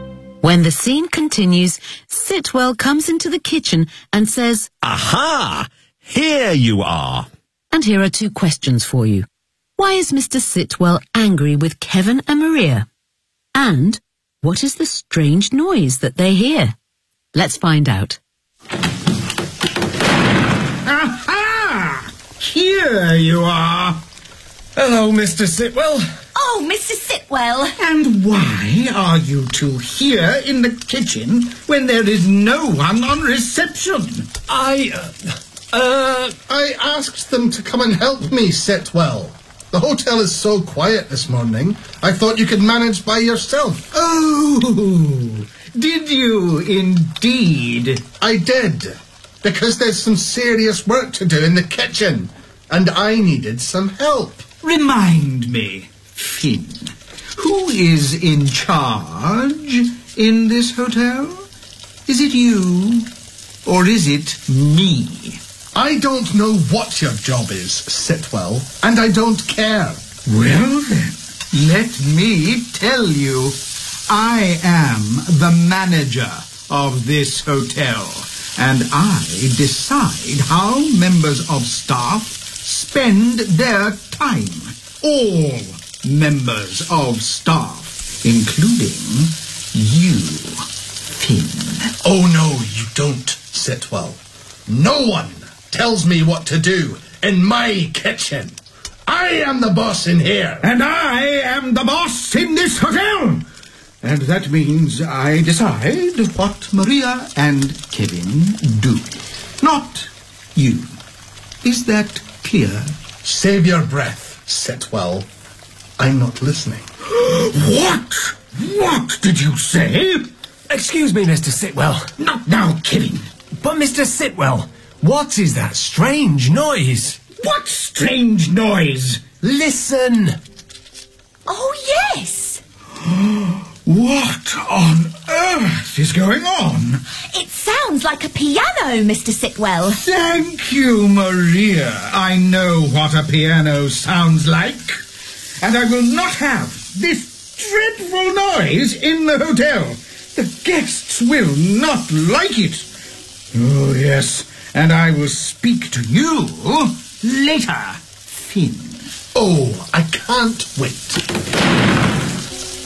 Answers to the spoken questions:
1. Why are you two here in the kitchen when there is no one on reception?
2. It sounds like a piano, Mr.